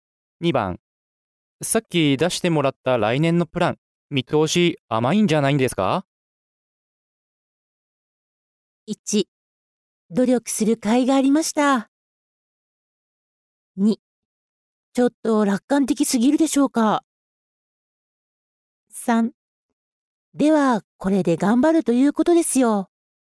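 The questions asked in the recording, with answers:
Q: さっき出してもらった来年のプラン、見通し甘いんじゃないんですか?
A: 2: ちょっと楽観的すぎるでしょうか。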